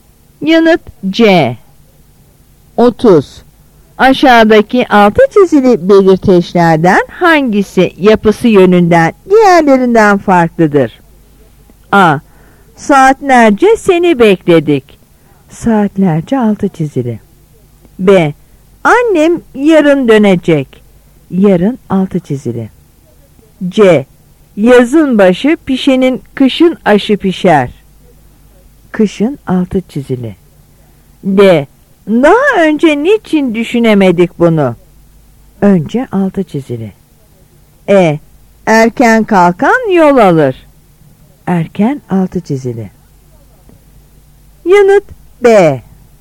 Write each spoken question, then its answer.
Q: Aşağıdaki altı çizili belirteçlerden hangisi yapısı yönünden diğerlerinden farklıdır?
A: Yanıt B.